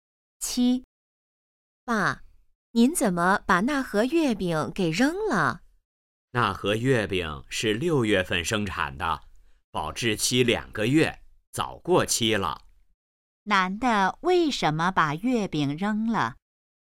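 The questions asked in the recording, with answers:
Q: 男的为什么把月饼扔了?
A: 月饼过期了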